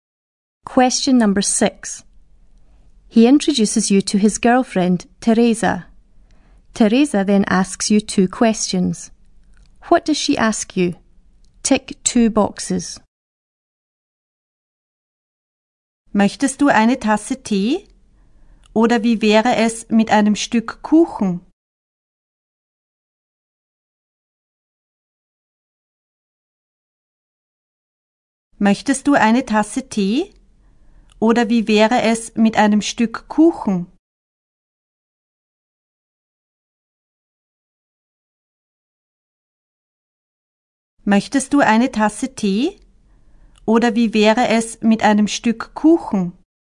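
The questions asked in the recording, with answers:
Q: What does she ask you?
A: Whether you want a cup of tea or a piece of cake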